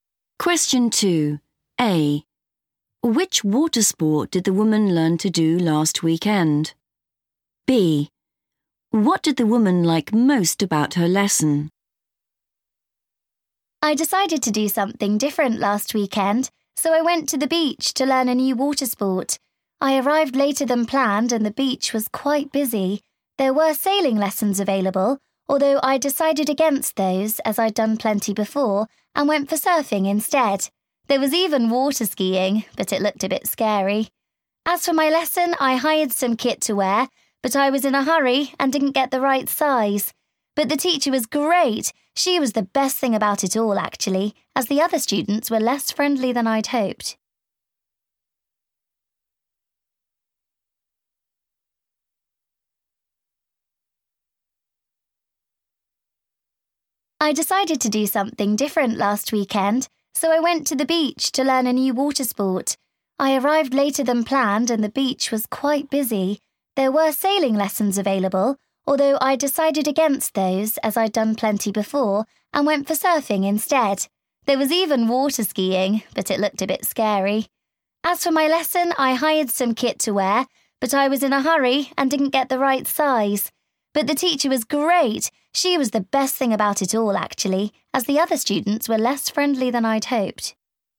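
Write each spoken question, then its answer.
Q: Which water sport did the woman learn to do last weekend?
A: surfing

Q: What did the woman like most about her lesson?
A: the teacher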